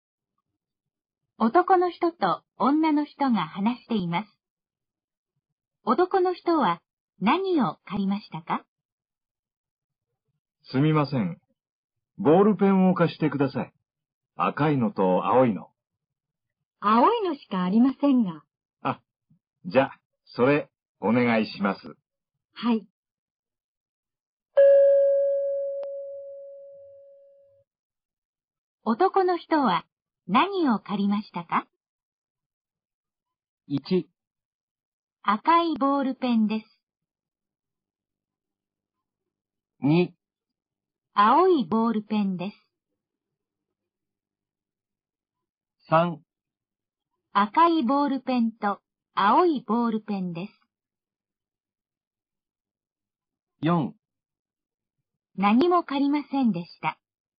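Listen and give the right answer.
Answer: 2: 青いボールペンです。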